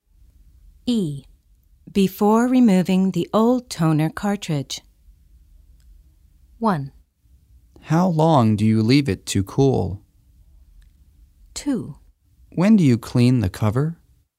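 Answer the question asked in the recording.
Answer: 2: When do you clean the cover?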